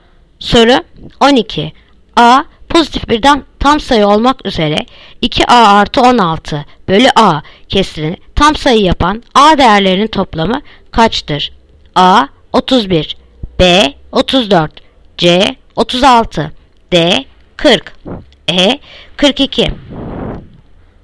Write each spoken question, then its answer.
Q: A pozitif bir tam sayı olmak üzere 2A artı 16 bölü A kesirini tam sayı yapan A değerlerinin toplamı kaçtır?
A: Yanıt Adana 31.